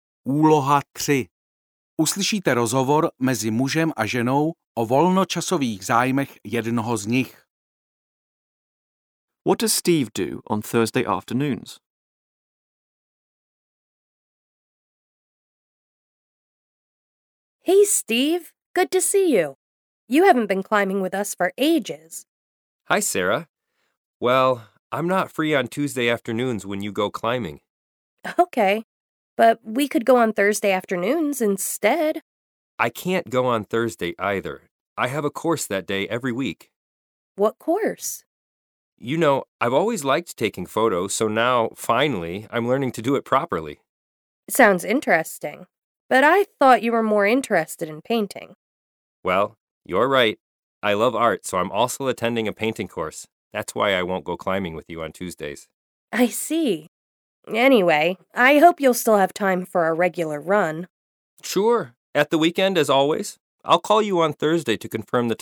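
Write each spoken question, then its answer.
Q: What does Steve do on Thursday afternoons?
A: He attends a photography course.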